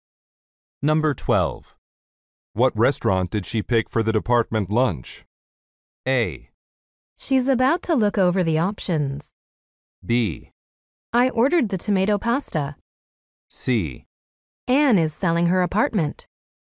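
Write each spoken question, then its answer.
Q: What restaurant did she pick for the department lunch?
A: A: She's about to look over the options.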